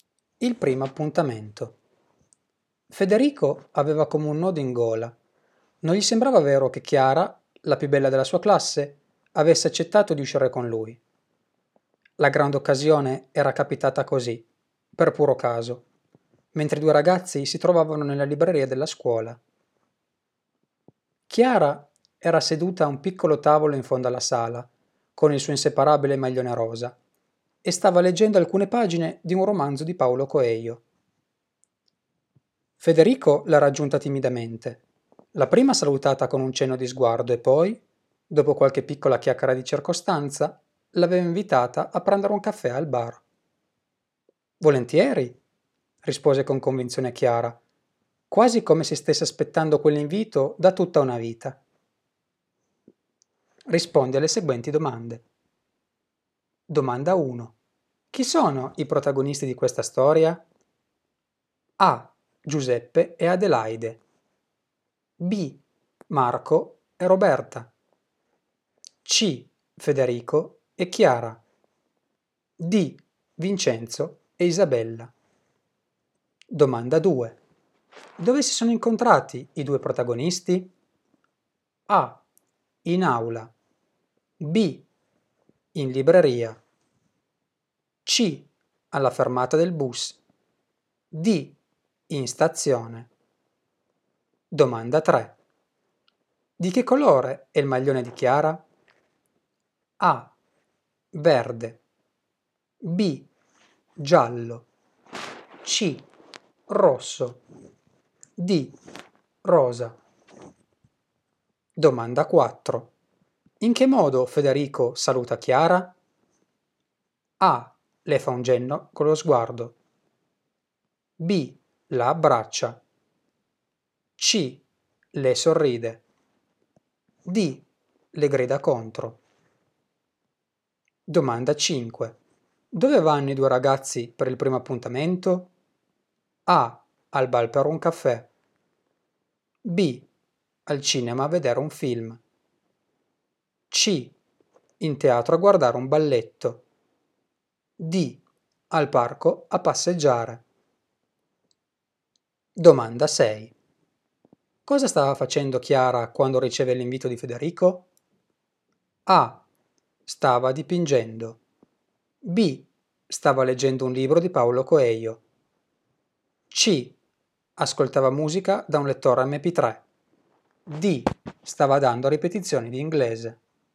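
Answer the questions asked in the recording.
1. C: Federico e Chiara
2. B: In libreria
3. D: Rosa
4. A: Le fa un cenno con lo sguardo
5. A: Al bar per un caffè
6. B: Stava leggendo un libro di Paolo Coelho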